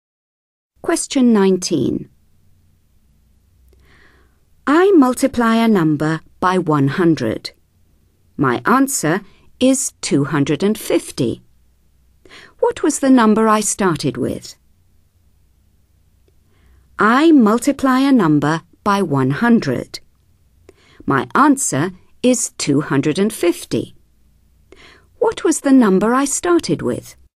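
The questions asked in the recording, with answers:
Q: What was the number I started with?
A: 2.5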